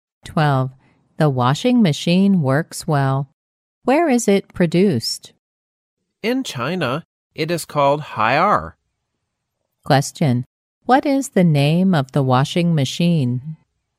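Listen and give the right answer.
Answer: Haier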